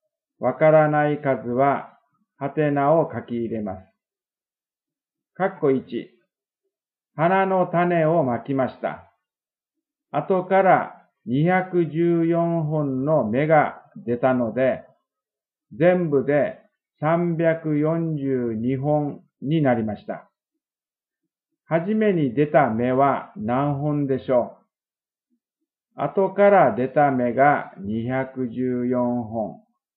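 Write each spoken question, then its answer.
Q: はじめに出た芽は何本でしょう?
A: 128本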